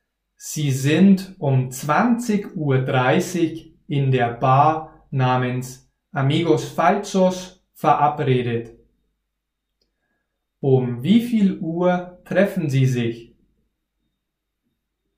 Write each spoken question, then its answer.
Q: Um wie viel Uhr treffen Sie sich?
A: Um 20.30 Uhr. Sie treffen sich um 20.30 Uhr.